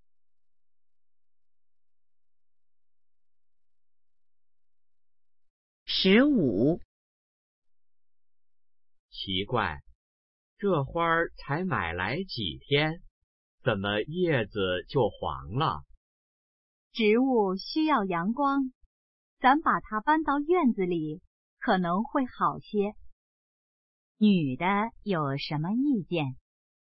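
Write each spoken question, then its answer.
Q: 女的有什么意见?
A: 把花搬到院子里晒太阳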